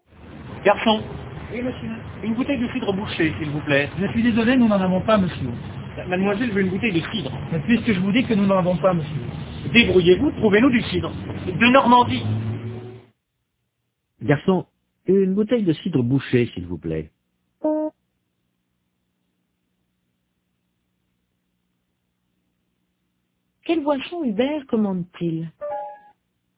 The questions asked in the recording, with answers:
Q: Quelle boisson Hubert commande-t-il?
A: Du cidre bouché.